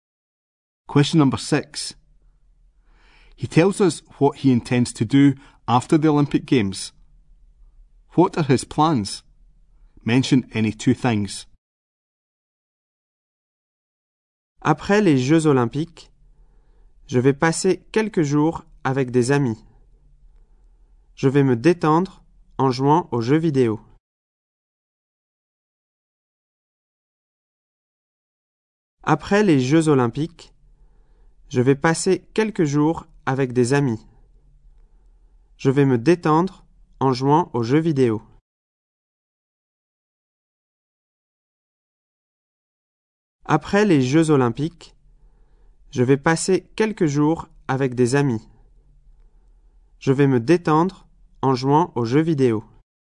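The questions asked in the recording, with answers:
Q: What are his plans? Mention any 2 things.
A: Spend a few days with friends; relax playing video games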